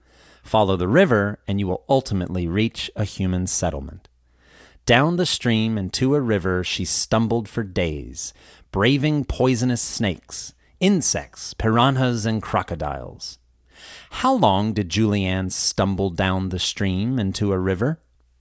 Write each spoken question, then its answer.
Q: How long did Julianne stumble down the stream and to a river?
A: She stumbled down the stream and to a river for days.